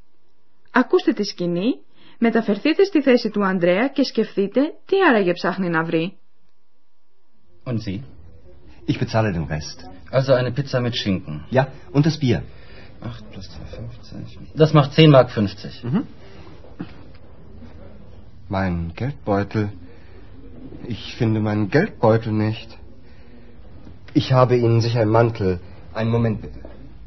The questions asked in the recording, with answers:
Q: Ακούστε τη σκηνή, μεταφερθείτε στη θέση του Ανδρέα και σκεφτείτε τι άραγε ψάχνει να βρει.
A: Geldbeutel. Και αυτό είναι που ψάχνει αλλά δεν βρίσκει ο Ανδρέας.